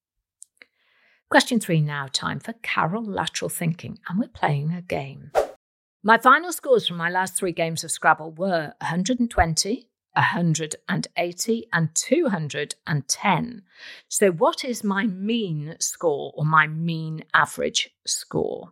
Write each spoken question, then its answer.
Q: So what is my mean score, or my mean average score?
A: And the answer I was looking for was 170.